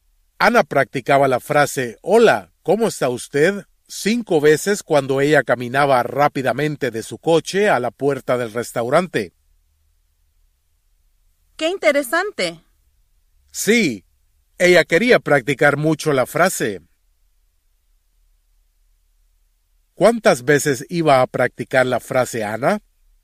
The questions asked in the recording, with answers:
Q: ¿Cuántas veces iba a practicar la frase Ana?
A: 5 veces cuando ella caminaba rápidamente de su coche a la puerta del restaurante.